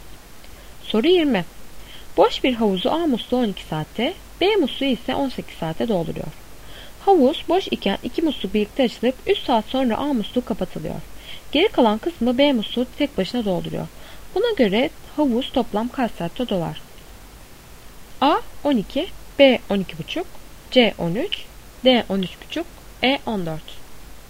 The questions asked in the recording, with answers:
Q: Buna göre havuz toplam kaç saatte dolar?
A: Doğru cevap D